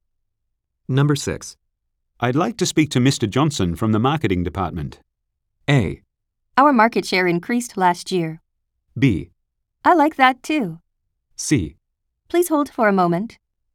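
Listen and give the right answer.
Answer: C: Please hold for a moment.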